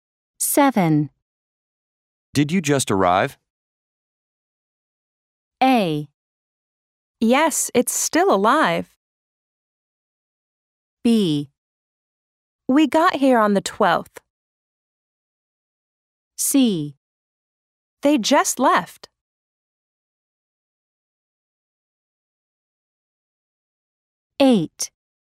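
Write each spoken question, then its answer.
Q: Did you just arrive?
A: B: We got here on the 12th.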